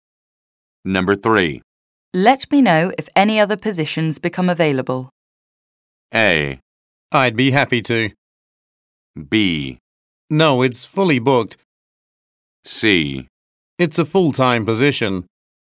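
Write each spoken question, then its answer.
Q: Let me know if any other positions become available.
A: A: I'd be happy to.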